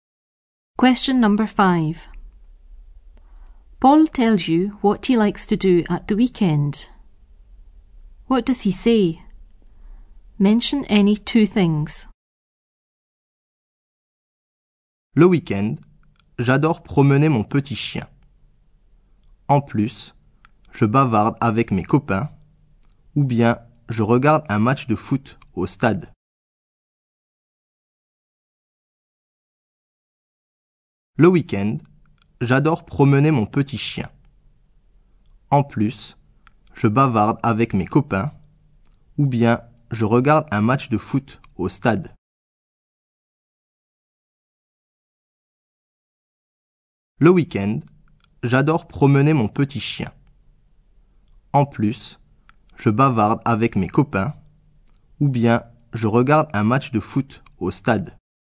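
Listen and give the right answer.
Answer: Walks his little dog; chats with friends; watches a football match at the stadium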